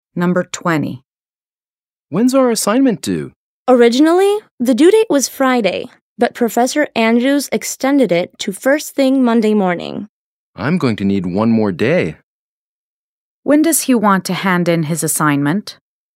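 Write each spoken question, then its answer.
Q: When does he want to hand in his assignment?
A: Tuesday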